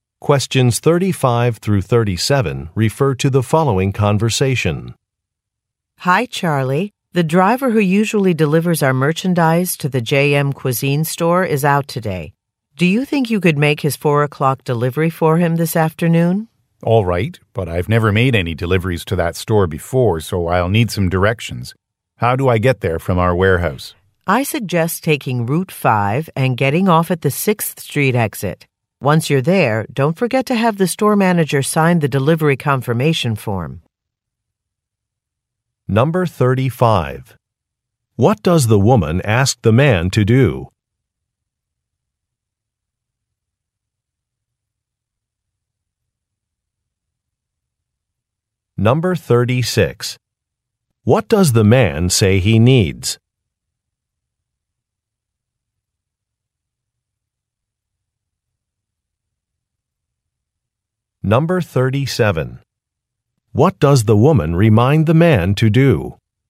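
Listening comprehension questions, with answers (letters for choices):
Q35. What does the woman ask the man to do?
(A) Schedule an appointment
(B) Make a coworker's delivery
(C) Call a colleague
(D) Prepare an invoice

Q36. What does the man say he needs?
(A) Keys to a vehicle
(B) A telephone number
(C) A price list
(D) Directions to a store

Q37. What does the woman remind the man to do?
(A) Notify his manager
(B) Check some merchandise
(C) Print a document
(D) Get a signature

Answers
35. B
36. D
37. D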